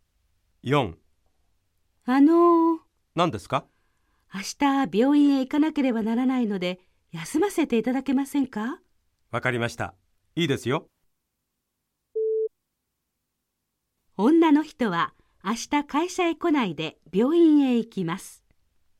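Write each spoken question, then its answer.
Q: 女の人は明日会社へ来ないで病院へ行きます。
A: ○(正しい)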